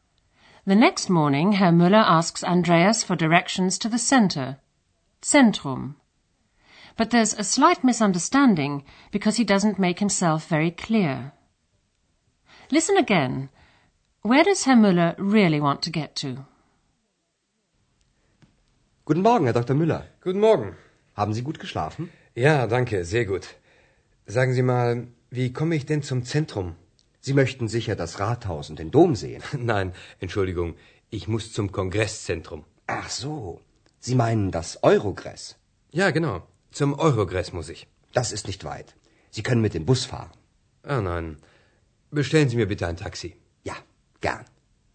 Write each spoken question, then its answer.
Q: Where does Herr Müller really want to get to?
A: Herr Müller doesn't want to get to the city center, but to the Congress Center.